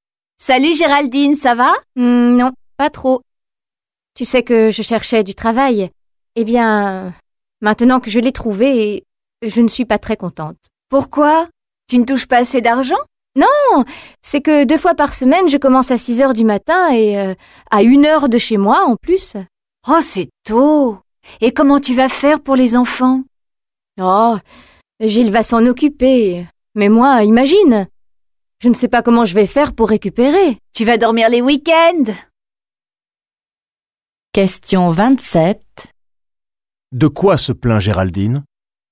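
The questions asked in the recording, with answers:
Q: De quoi se plaint Géraldine?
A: De ses horaires de travail : deux fois par semaine, elle commence à 6 heures du matin, à une heure de chez elle.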